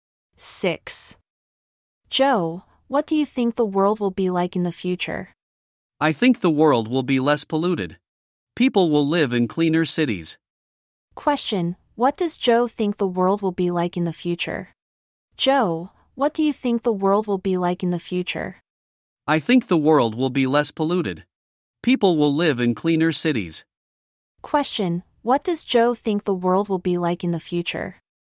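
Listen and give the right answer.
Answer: Less polluted, with cleaner cities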